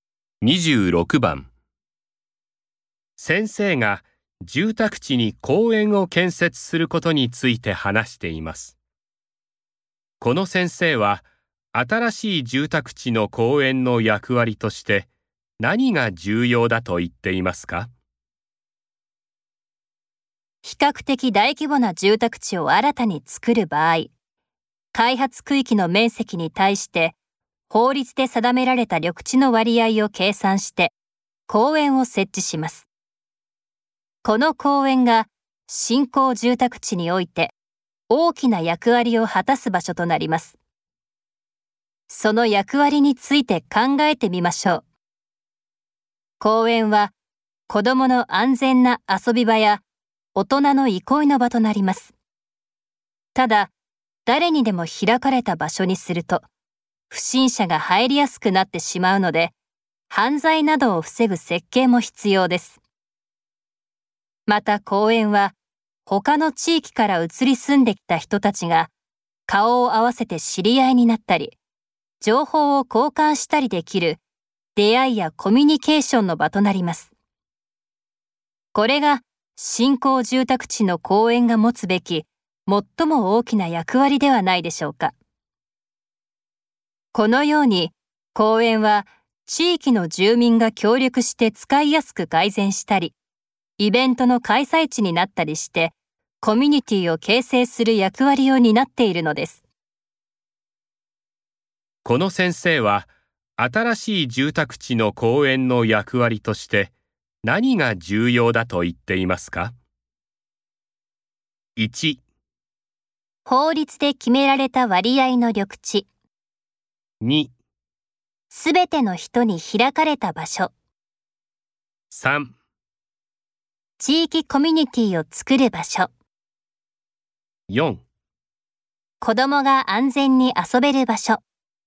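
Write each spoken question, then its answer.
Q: この先生は新しい住宅地の公園の役割として何が重要だと言っていますか?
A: 3: 地域コミュニティを作る場所。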